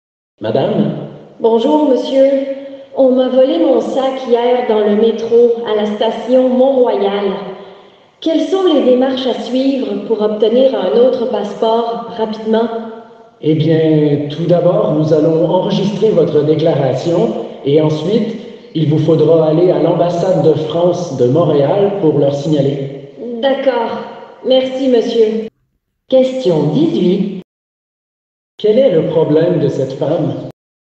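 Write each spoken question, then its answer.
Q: Quel est le problème de cette femme ?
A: On lui a volé son sac (avec son passeport) dans le métro.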